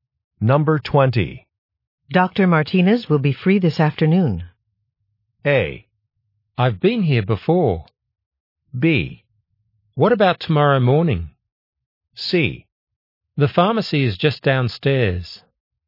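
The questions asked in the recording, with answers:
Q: Dr. Martinez will be free this afternoon.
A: B: What about tomorrow morning?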